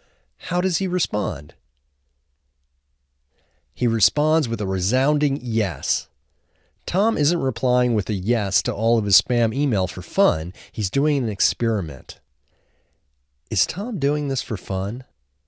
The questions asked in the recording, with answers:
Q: Is Tom doing this for fun?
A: No, he's not doing this for fun.